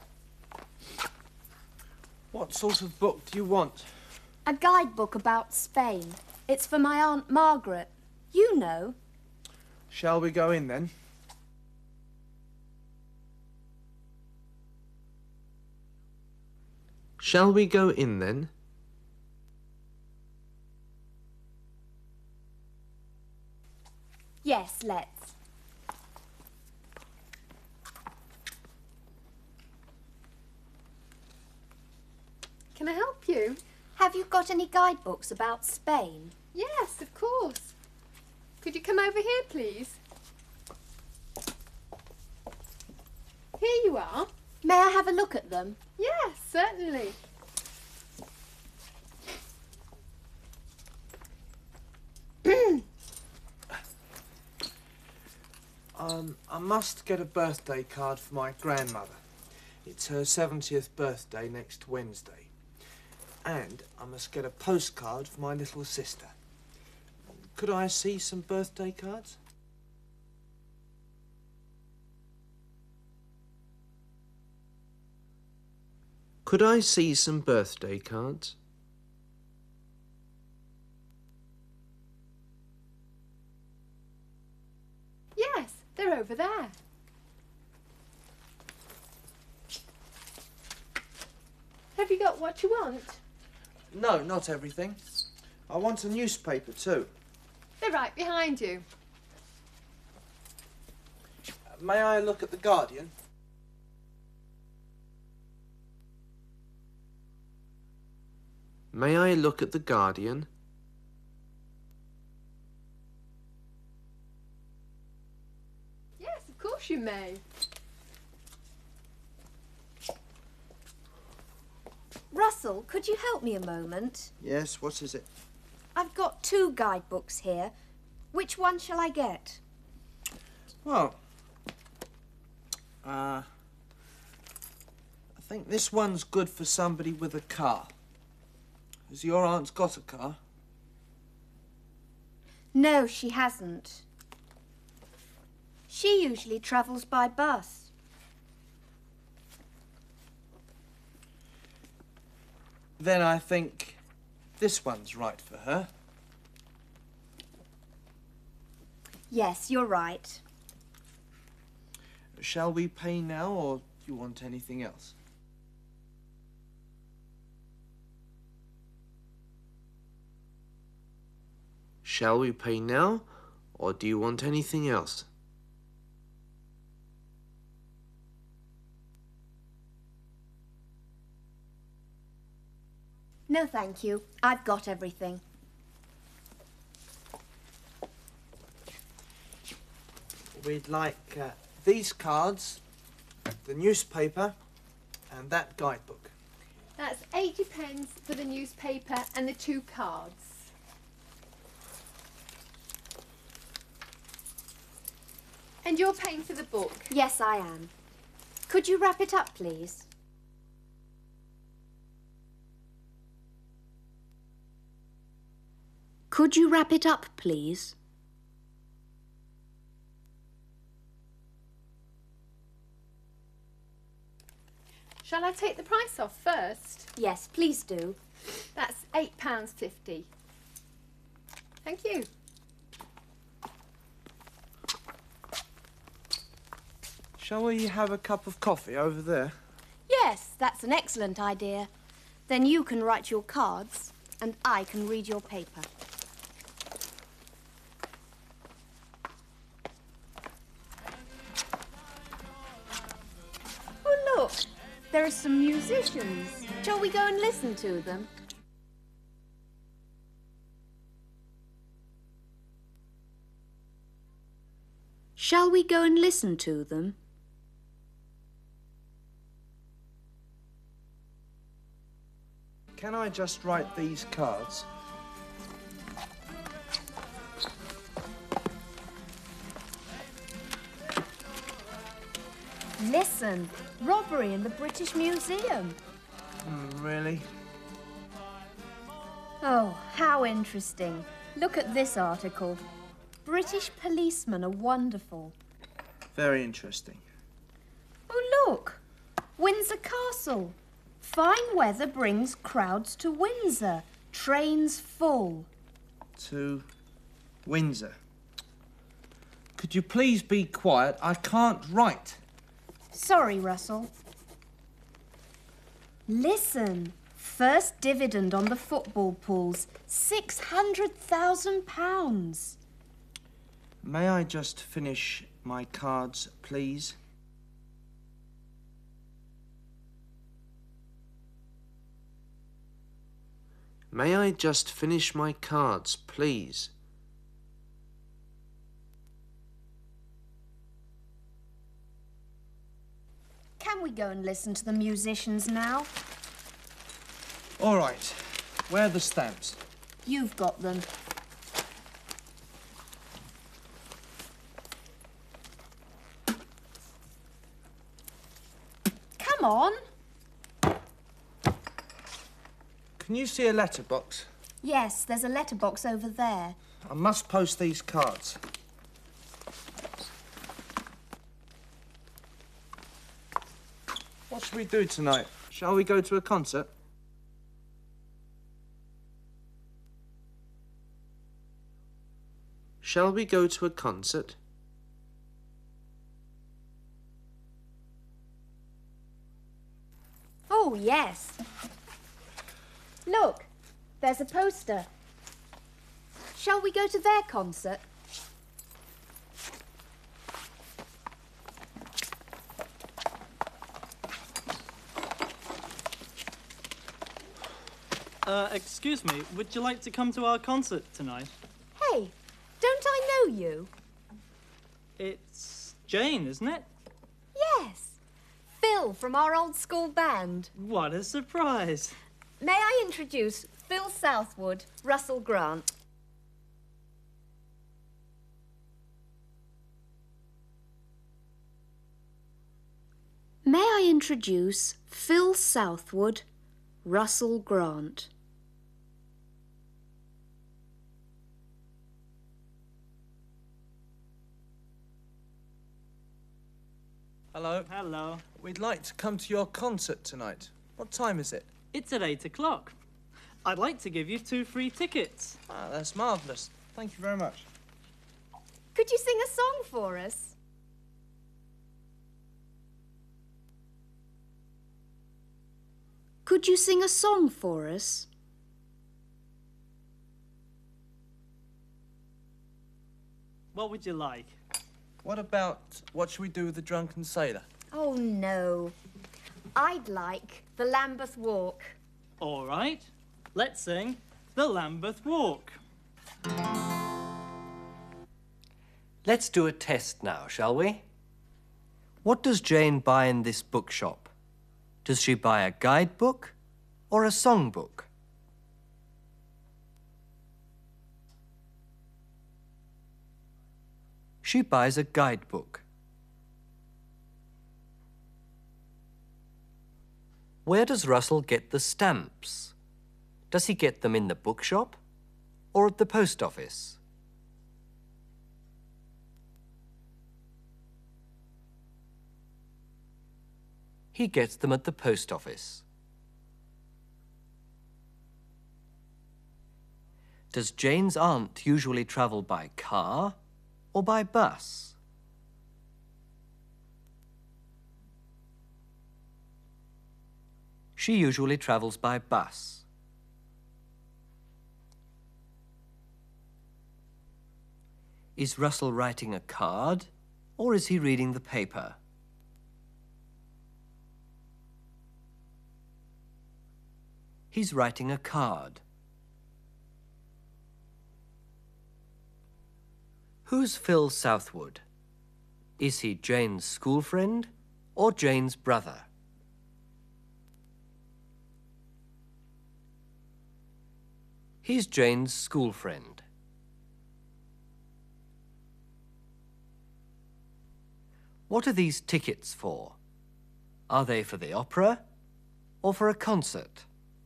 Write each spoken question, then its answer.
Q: What does Jane buy in this bookshop? Does she buy a guidebook or a songbook?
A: she buys a guidebook.

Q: Does Jane's aunt usually travel by car or by bus?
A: She usually travels by bus.

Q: Who's Phil Southwood? Is he Jane's school friend or Jane's brother?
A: He's Jane's school friend.

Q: What are these tickets for? Are they for the opera or for a concert?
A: They're for a concert.